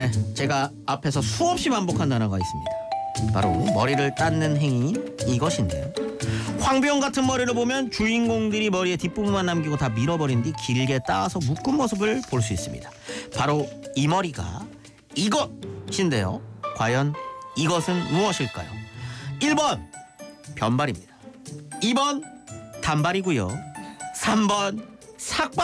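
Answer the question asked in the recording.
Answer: 1: 변발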